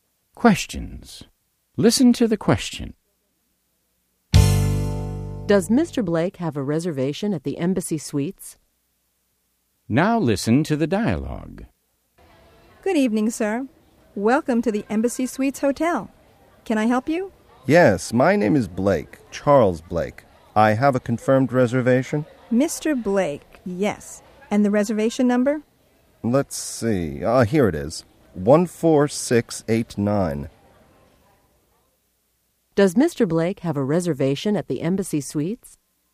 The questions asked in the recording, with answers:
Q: Does Mr. Blake have a reservation at the Embassy Suites?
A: Yes, he has a confirmed reservation.